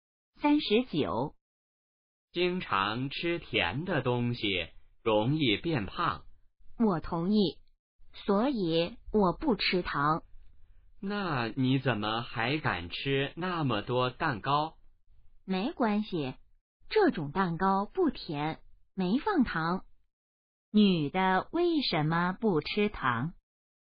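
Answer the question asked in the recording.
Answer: 怕变胖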